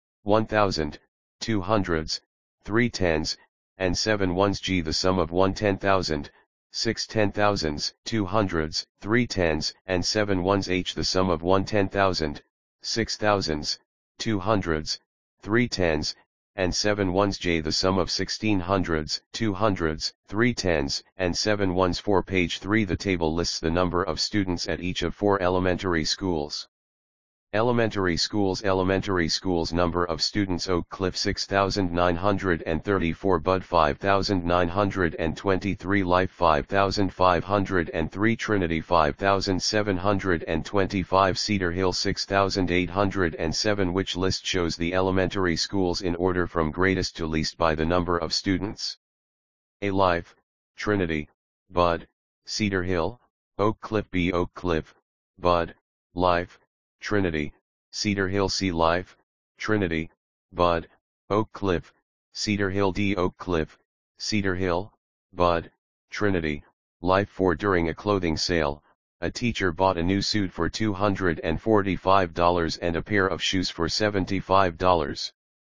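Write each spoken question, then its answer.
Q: Which list shows the elementary schools in order from greatest to least by the number of students?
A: D: Oak Cliff, Cedar Hill, Bud, Trinity, Life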